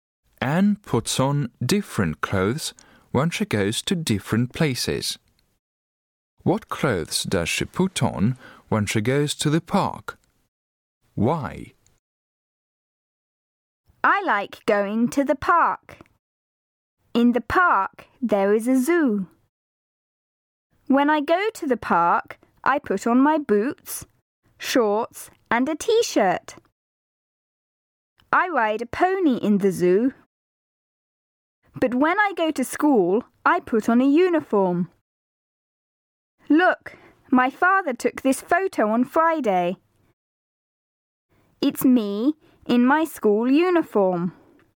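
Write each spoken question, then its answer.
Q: What clothes does she put on when she goes to the park?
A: Boots, shorts and a t-shirt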